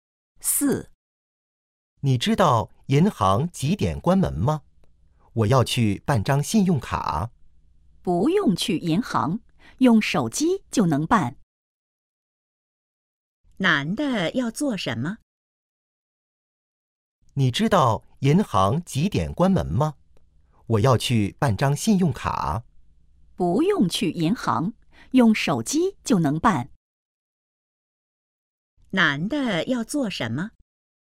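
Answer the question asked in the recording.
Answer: 办信用卡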